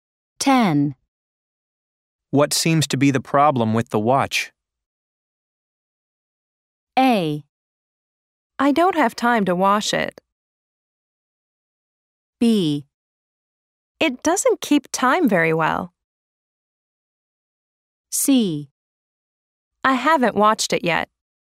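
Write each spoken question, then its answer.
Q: What seems to be the problem with the watch?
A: B: It doesn't keep time very well.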